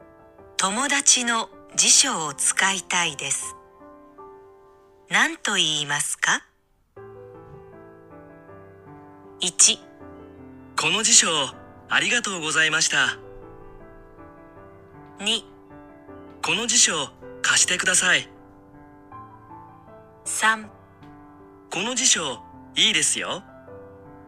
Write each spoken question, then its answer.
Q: 友達の辞書を使いたいです何と言いますか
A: 答えは2番ですね辞書を貸してください2番が答えになります。